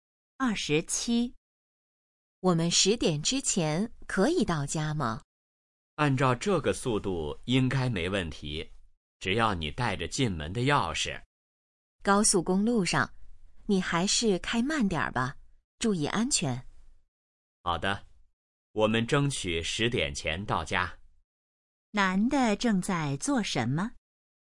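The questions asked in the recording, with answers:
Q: 男的正在做什么?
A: 开车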